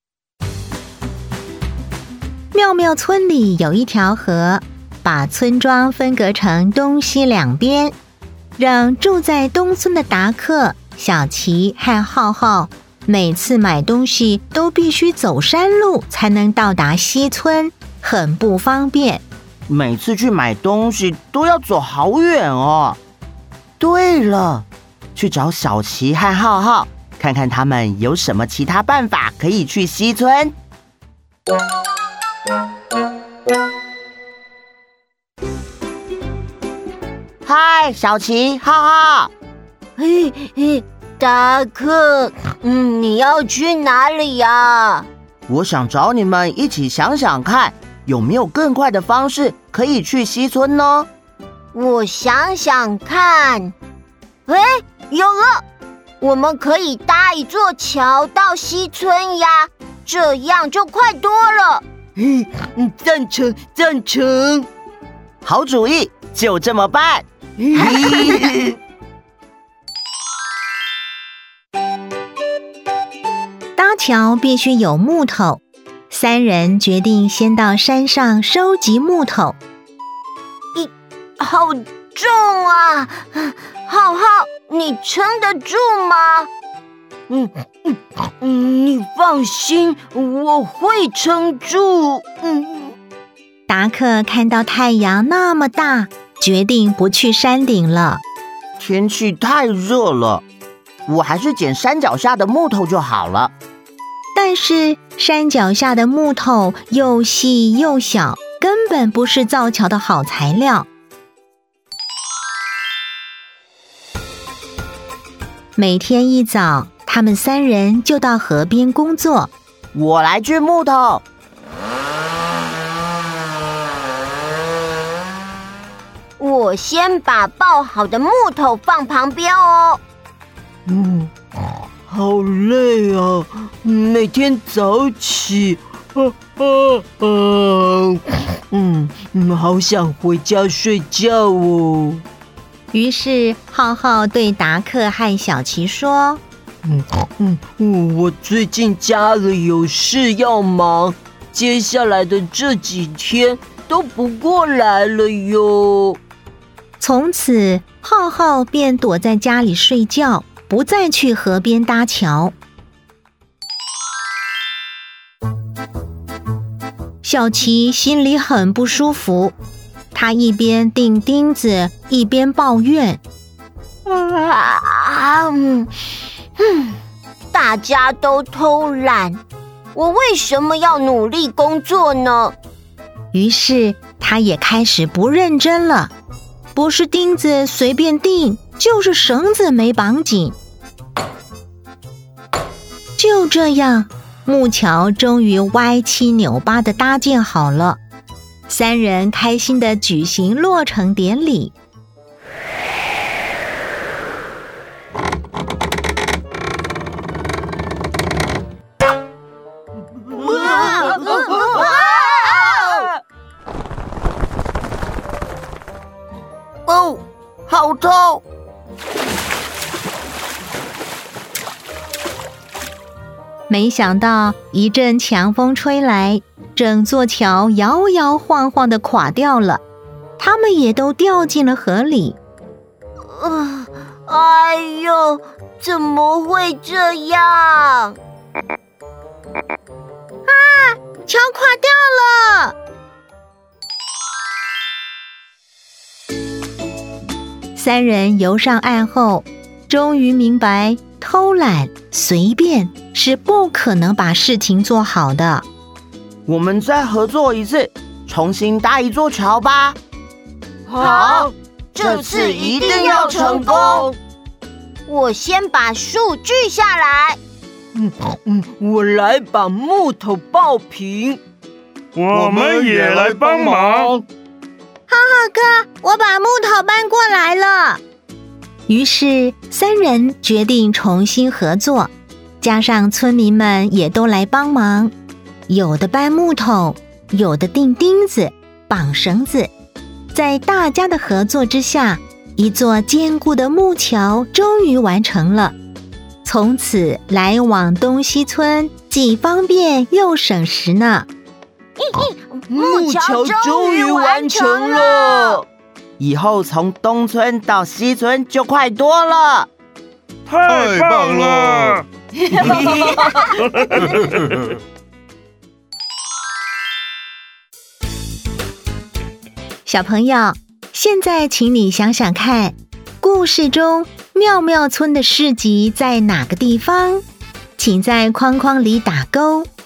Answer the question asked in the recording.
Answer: 西村。